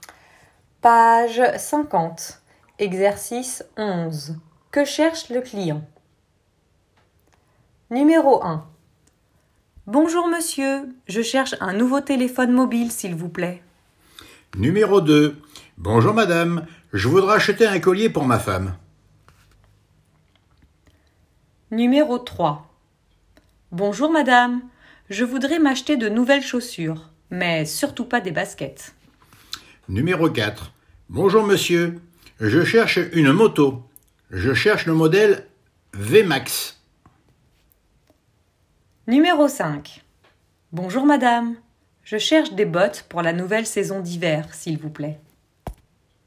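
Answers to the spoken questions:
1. un nouveau téléphone mobile
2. un collier pour sa femme
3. de nouvelles chaussures (pas des baskets)
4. une moto (modèle VMAX)
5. des bottes pour l'hiver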